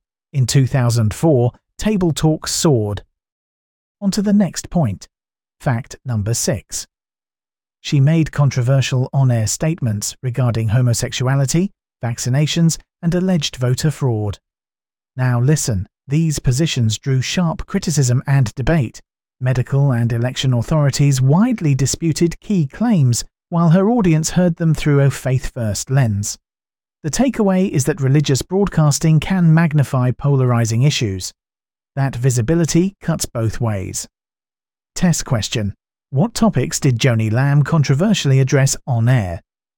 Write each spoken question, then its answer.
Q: What topics did Joni Lamb controversially address on air?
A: Correct answer. Homosexuality, vaccinations, and voter fraud.